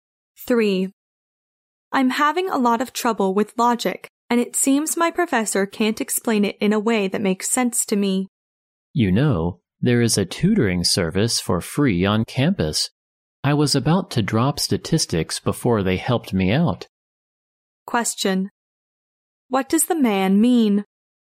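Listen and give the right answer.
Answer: The woman should try the free tutoring service on campus.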